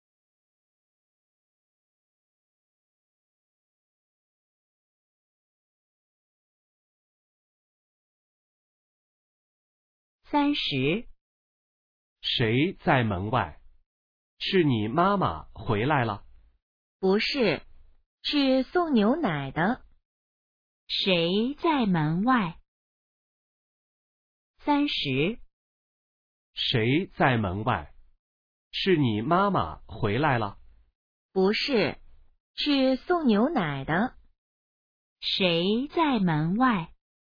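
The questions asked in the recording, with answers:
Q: 谁在门外?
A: 送牛奶的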